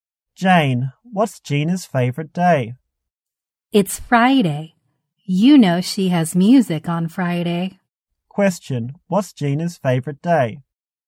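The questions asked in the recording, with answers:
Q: What's Gina's favorite day?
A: Friday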